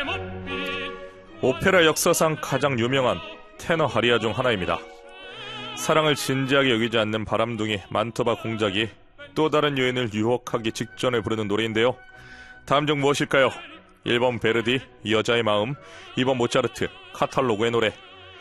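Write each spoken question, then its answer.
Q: 다음 중 무엇일까요? 1번 베르디, 여자의 마음, 2번 모차르트, 카탈로그의 노래.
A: 1: 베르디, 여자의 마음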